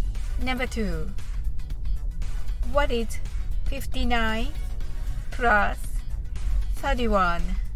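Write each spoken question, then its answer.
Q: What is 59 plus 31?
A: 90 (ninety)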